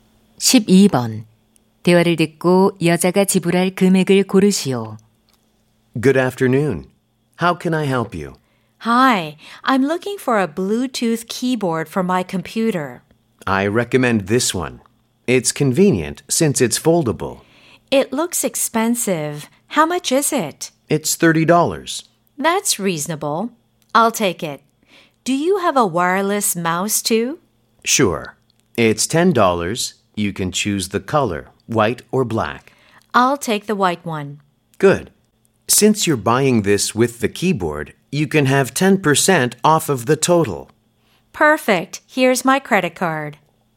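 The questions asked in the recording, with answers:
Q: 대화를 듣고 여자가 지불할 금액을 고르시오.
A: $36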